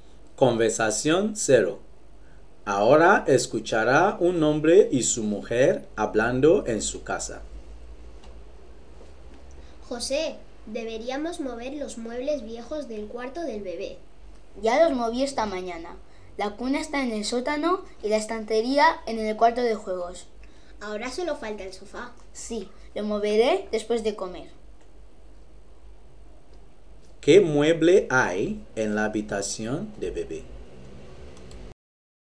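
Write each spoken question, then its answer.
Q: ¿Qué mueble hay en la habitación de bebé?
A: El sofá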